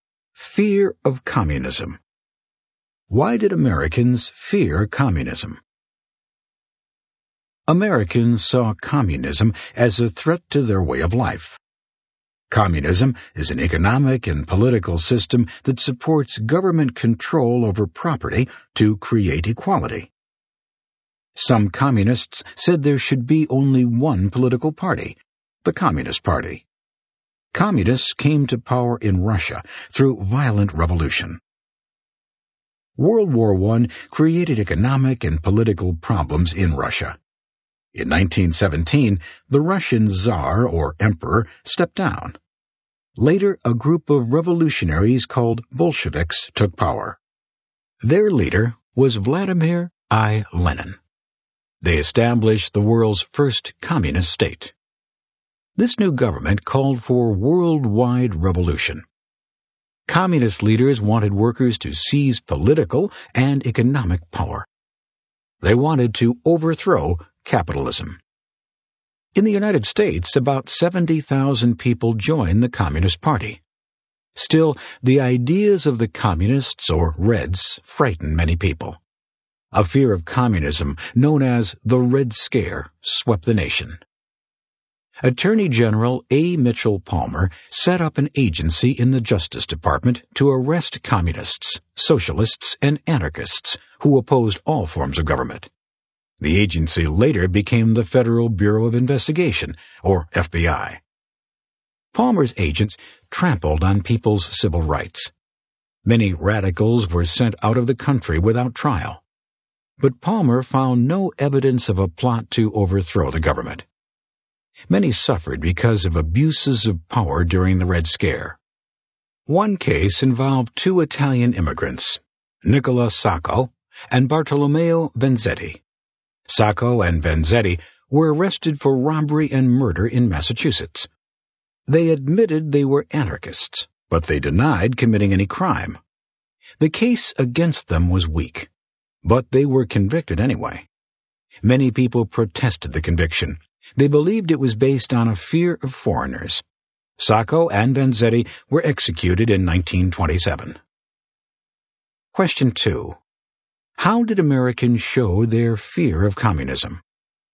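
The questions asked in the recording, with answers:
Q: How did Americans show their fear of communism?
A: Through the Red Scare: Palmer's agency arrested communists, socialists and anarchists and deported radicals without trial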